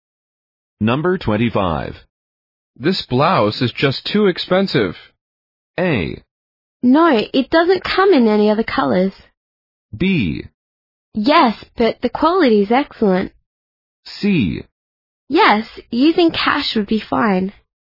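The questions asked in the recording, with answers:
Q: This blouse is just too expensive.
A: B: Yes, but the quality is excellent.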